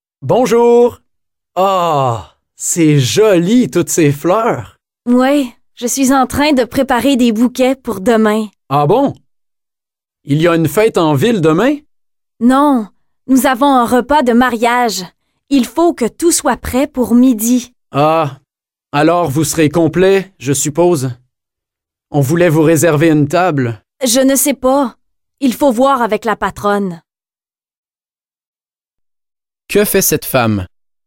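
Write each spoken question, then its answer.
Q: Que fait cette femme?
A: Elle prépare des bouquets de fleurs pour un repas de mariage.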